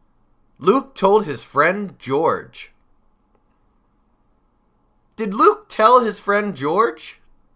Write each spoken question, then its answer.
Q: Did Luke tell his friend George?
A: He certainly did. Luke told his friend George.